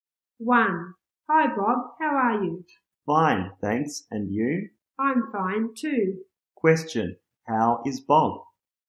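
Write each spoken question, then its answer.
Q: How is Bob?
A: Fine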